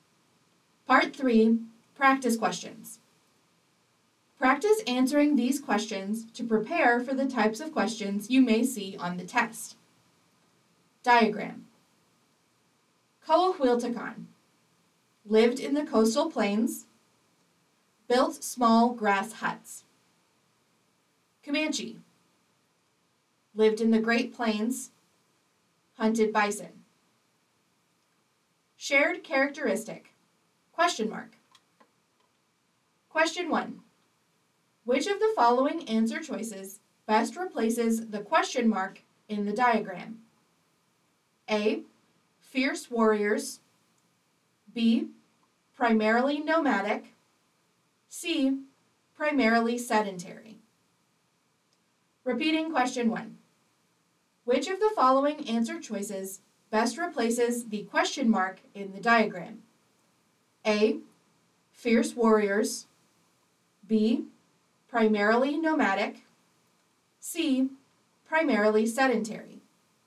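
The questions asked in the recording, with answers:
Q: Which of the following answer choices best replaces the question mark in the diagram?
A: B: Primarily nomadic.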